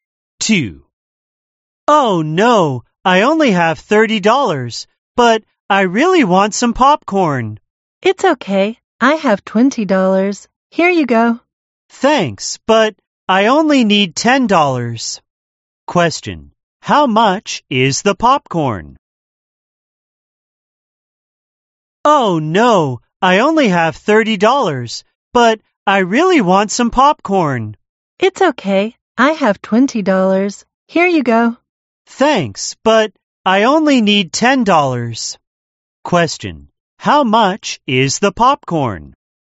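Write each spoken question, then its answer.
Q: How much is the popcorn?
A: $10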